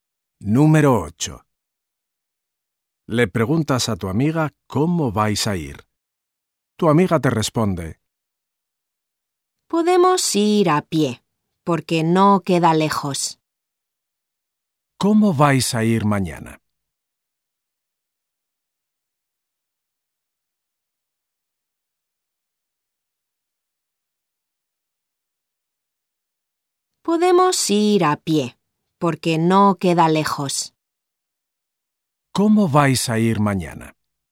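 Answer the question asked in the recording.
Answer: A pie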